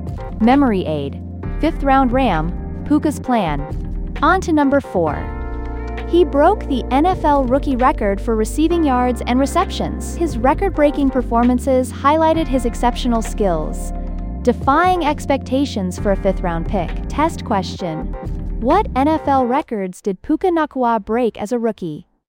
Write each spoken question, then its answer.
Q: What NFL records did Puka Nacua break as a rookie?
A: Receiving yards and receptions.